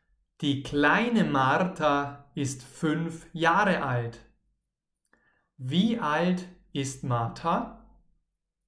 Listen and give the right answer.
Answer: 5. Martha ist 5 Jahre alt.